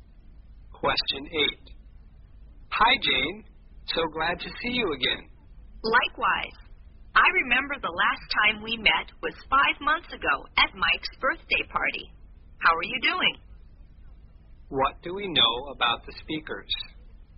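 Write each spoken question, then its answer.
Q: What do we know about the speakers?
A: They last met 5 months ago at Mike's birthday party.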